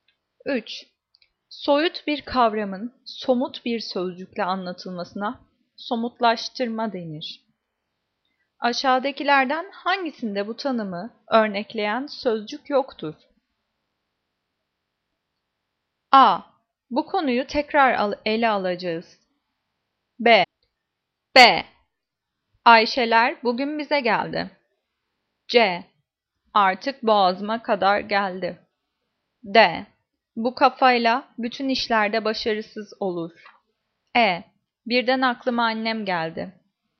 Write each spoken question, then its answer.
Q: Aşağıdakilerden hangisinde bu tanımı örnekleyen sözcük yoktur?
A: Cevap B. Ayşeler bugün bize geldi.